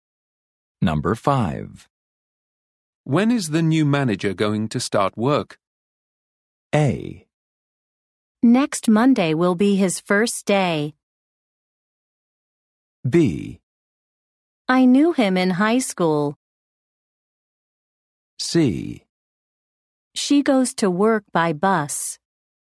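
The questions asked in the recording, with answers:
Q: When is the new manager going to start work?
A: A: Next Monday will be his first day.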